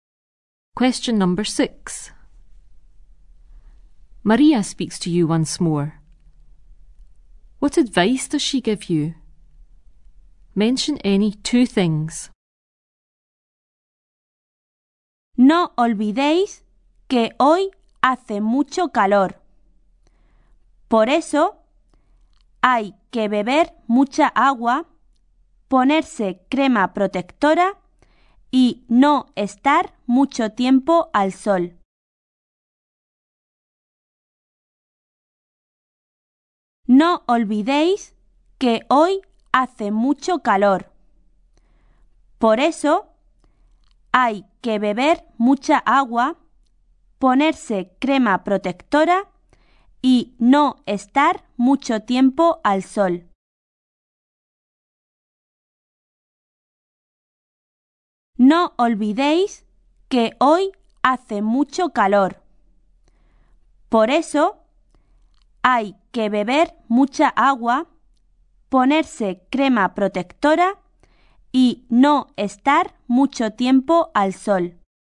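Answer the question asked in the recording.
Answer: Any two: drink lots of water, put on sun cream, don't stay in the sun too long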